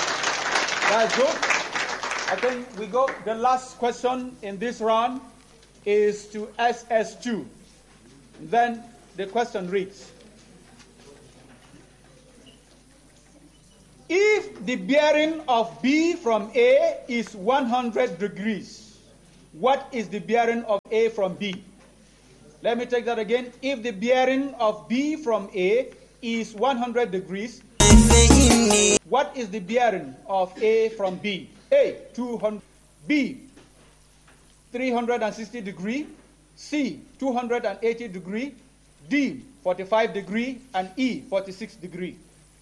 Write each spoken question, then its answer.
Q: if the bearing of B from A is 100 degrees, what is the bearing of A from B?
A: 280 degrees.